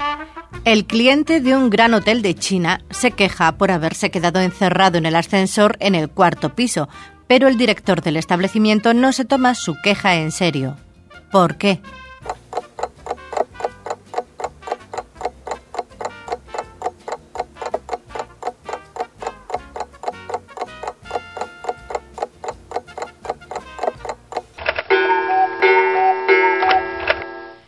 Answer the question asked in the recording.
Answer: Solución, porque en los edificios chinos no hay ningún piso que lleve el número 4.